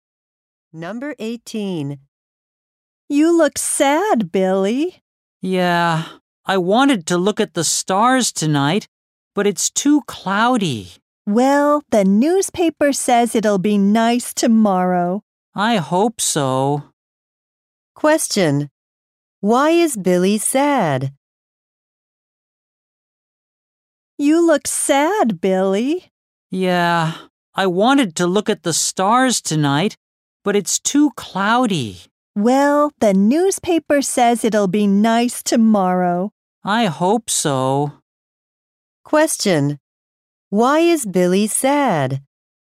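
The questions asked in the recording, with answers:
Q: Why is Billy sad?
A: It's too cloudy to look at the stars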